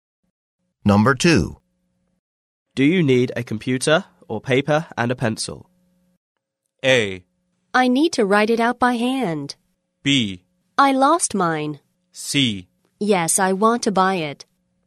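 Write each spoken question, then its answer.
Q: Do you need a computer or paper and a pencil?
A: A: I need to write it out by hand.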